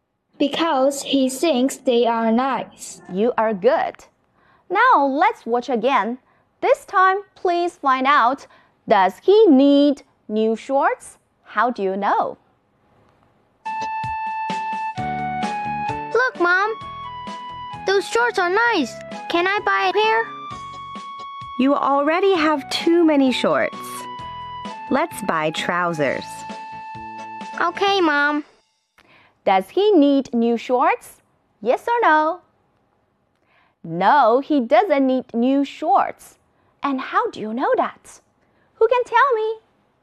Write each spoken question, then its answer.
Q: And how do you know that? Who can tell me?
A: Because Mom says you already have too many shorts.